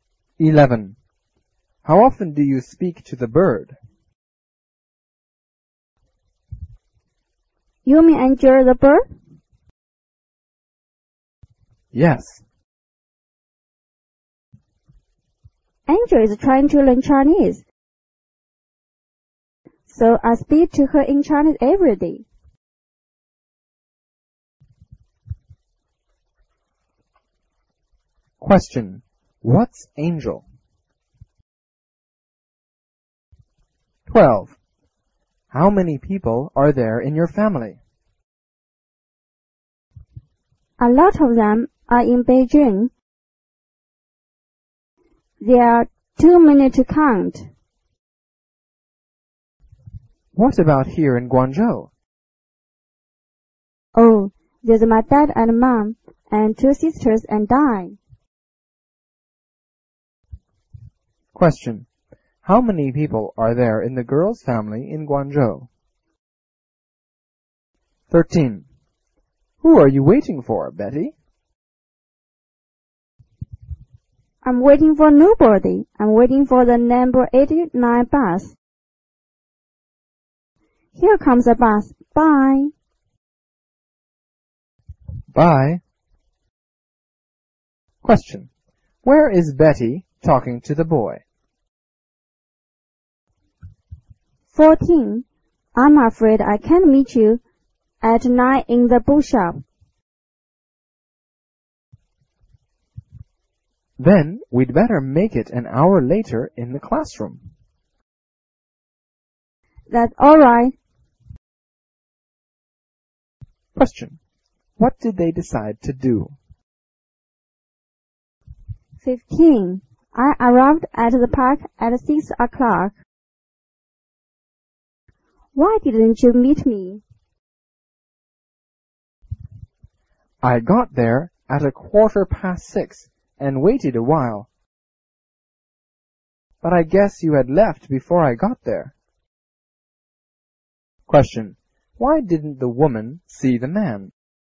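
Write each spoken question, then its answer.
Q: What's Angel?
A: a bird

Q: How many people are there in the girl's family in Guangzhou?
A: five

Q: Where is Betty talking to the boy?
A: at the bus stop

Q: What did they decide to do?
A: meet an hour later in the classroom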